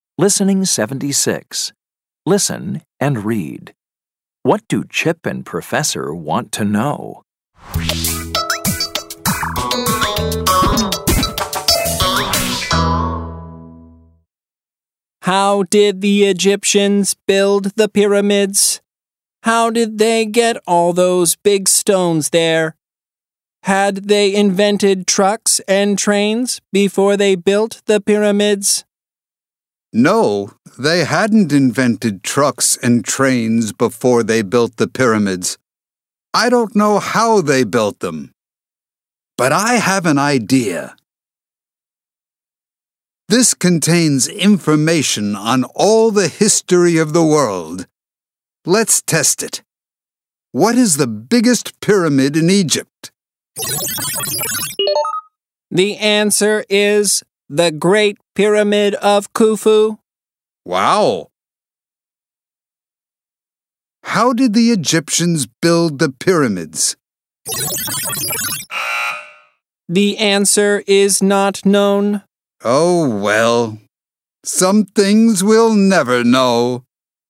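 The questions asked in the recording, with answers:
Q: What do Chip and Professor want to know?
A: How the Egyptians built the pyramids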